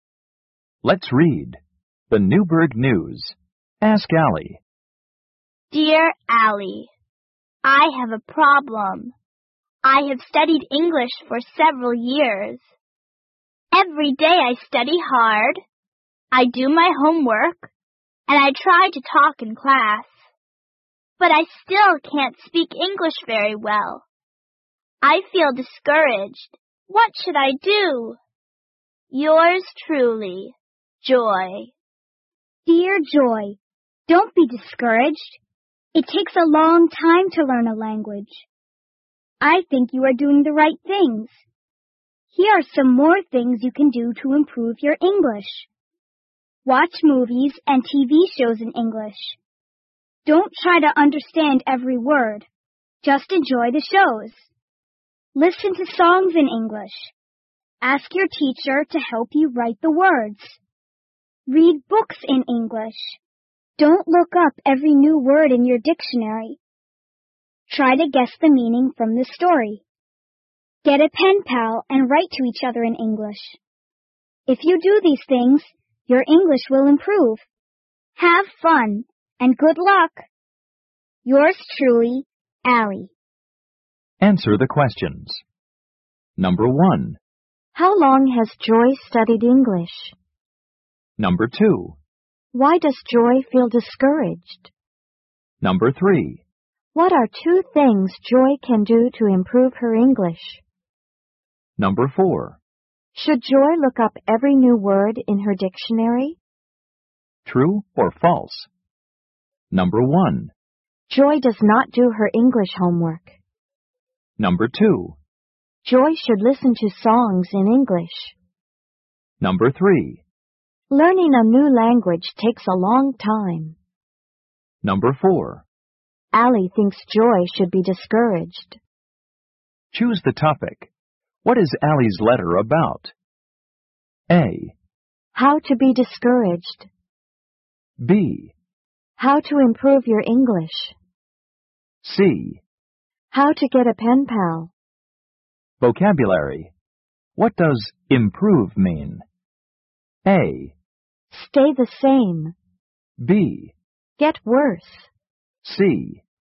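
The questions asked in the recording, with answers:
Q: How long has Joy studied English?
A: For several years

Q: Why does Joy feel discouraged?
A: She still can't speak English very well

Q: What are 2 things Joy can do to improve her English?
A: Watch movies and TV shows in English and listen to songs in English

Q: Should Joy look up every new word in her dictionary?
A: No

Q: Joy does not do her English homework.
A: False

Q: Joy should listen to songs in English.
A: True

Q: Learning a new language takes a long time.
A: True

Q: Allie thinks Joy should be discouraged.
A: False

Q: What is Allie's letter about?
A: B: How to improve your English.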